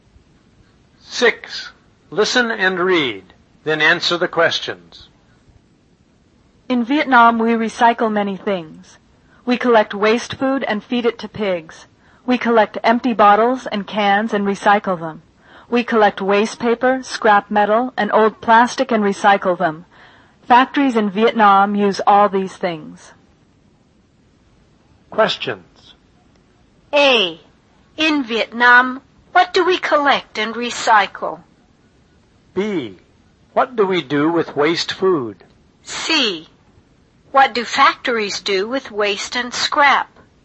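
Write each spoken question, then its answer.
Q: In Vietnam, what do we collect and recycle?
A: Empty bottles and cans, waste paper, scrap metal and old plastic

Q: What do we do with waste food?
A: We feed it to pigs

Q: What do factories do with waste and scrap?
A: They use them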